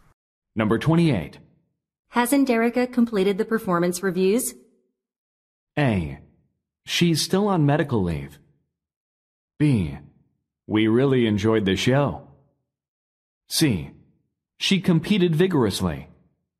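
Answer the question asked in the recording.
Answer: A: She's still on medical leave.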